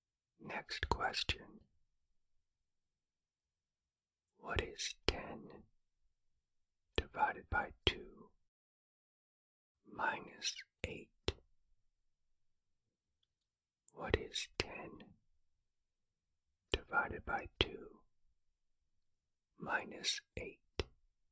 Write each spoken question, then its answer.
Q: What is 10 divided by 2 minus 8?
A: The answer is negative 3.